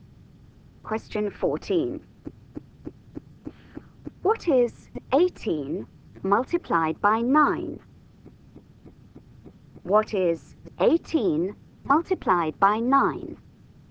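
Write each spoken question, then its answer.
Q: What is 18 multiplied by 9?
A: 162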